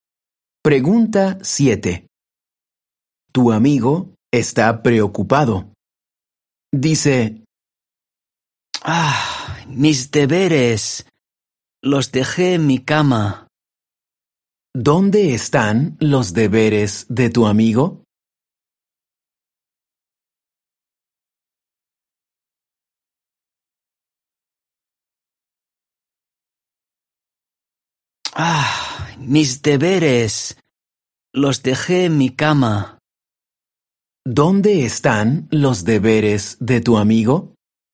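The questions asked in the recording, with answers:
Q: ¿Dónde están los deberes de tu amigo?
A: En su cama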